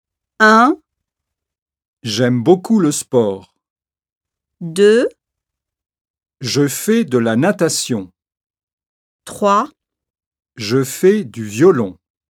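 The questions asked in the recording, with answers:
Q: Quel sport faites-vous?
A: 2: Je fais de la natation.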